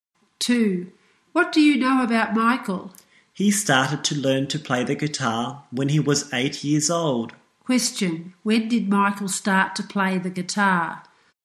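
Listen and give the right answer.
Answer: When he was 8 years old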